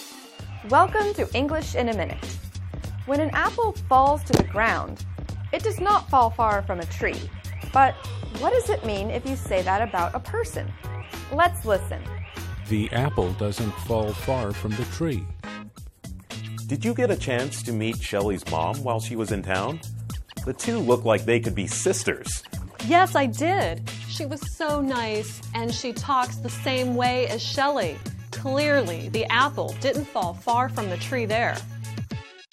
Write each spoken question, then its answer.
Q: But what does it mean if you say that about a person?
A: If the apple does not fall far from the tree, it means two people are very similar.